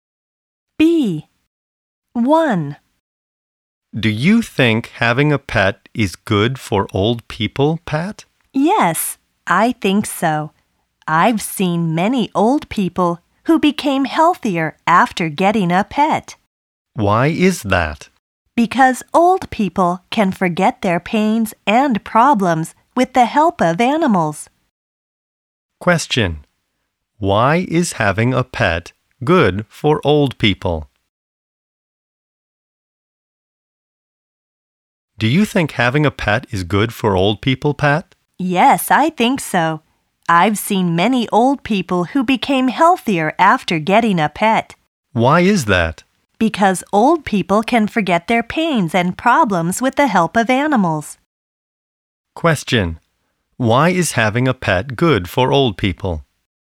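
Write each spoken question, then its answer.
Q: Why is having a pet good for old people?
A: Because old people can forget their pains and problems with the help of animals.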